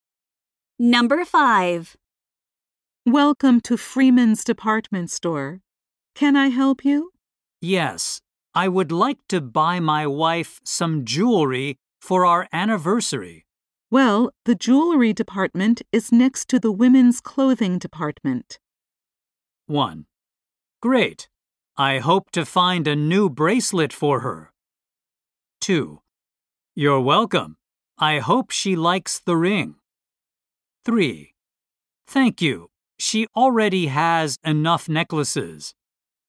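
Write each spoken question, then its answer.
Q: Well, the jewelry department is next to the women's clothing department.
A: 1: Great. I hope to find a new bracelet for her.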